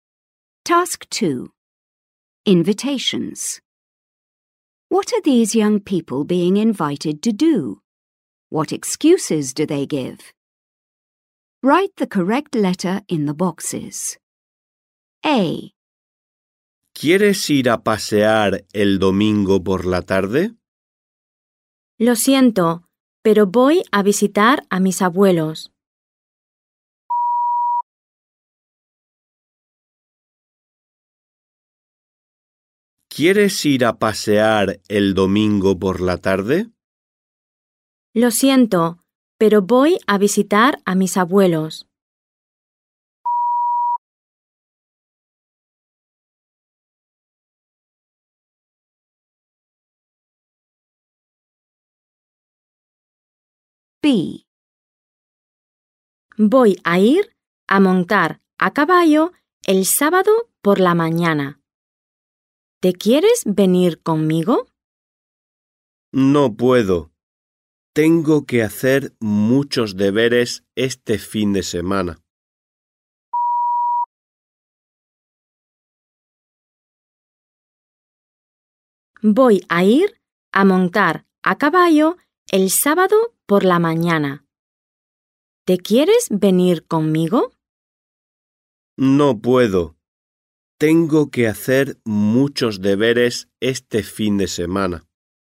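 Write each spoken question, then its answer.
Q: What are these young people being invited to do?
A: A: go for a walk on Sunday afternoon; B: go horse riding on Saturday morning

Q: What excuses do they give?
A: A: visiting grandparents; B: has lots of homework this weekend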